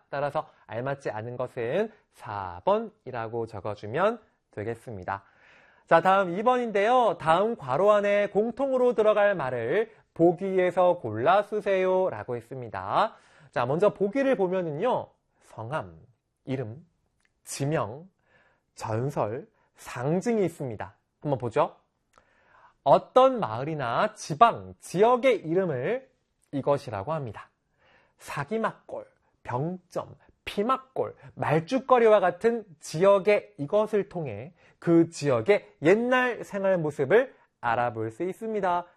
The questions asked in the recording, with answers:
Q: 다음 괄호 안에 공통으로 들어갈 말을 보기에서 골라 쓰세요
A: 지명이지요.